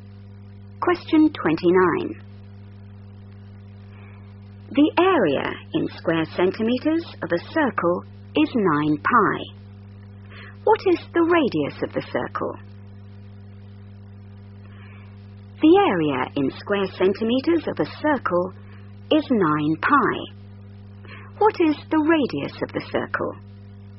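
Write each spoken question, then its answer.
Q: What is the radius of the circle?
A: 3 cm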